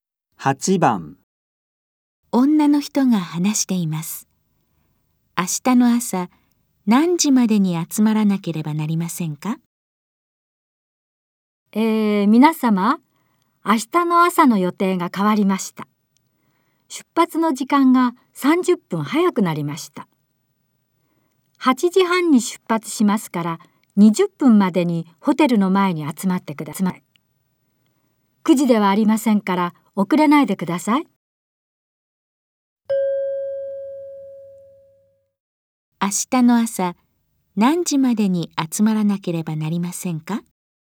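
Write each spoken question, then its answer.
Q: 明日の朝何時までに集まらなければなりませんか?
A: 8時20分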